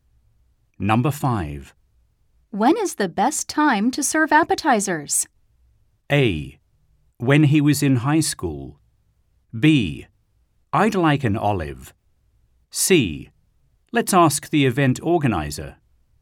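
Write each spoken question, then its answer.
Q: When is the best time to serve appetizers?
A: C: Let's ask the event organizer.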